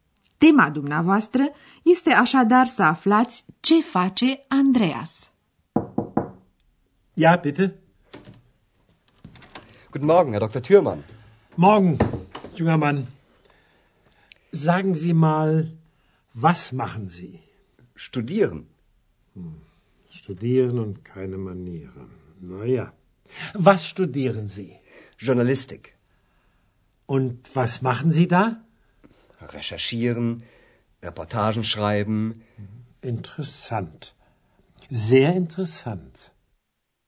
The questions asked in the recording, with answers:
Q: Tema dumneavoastră este așadar să aflați ce face Andreas.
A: Andreas e student la ziaristică.